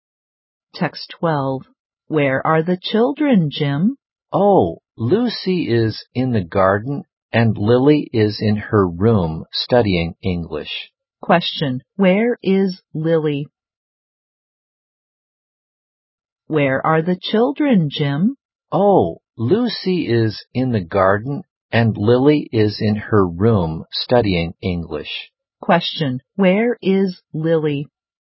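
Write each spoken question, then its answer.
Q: Where is Lily?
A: In her room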